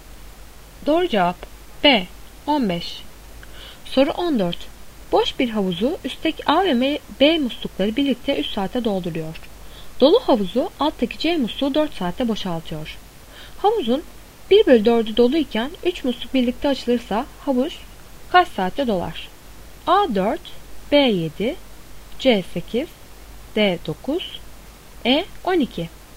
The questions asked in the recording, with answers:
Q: Havuzun 1 bölü 4'ü doluyken 3 musluk birlikte açılırsa havuz kaç saatte dolar?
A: Doğru cevap D 9.